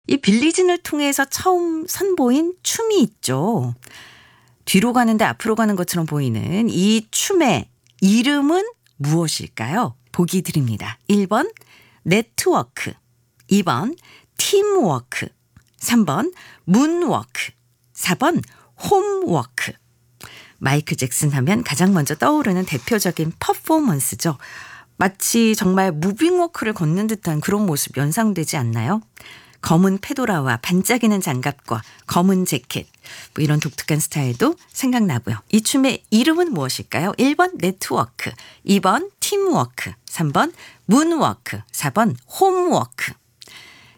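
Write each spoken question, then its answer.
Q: 이 춤의 이름은 무엇일까요?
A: 3번: 문워크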